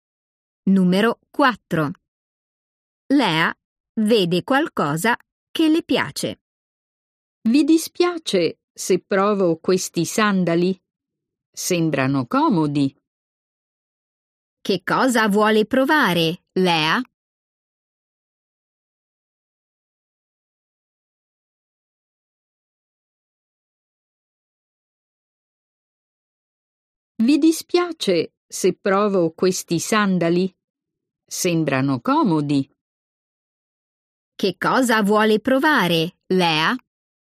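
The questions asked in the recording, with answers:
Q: Che cosa vuole provare, Lea?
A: dei sandali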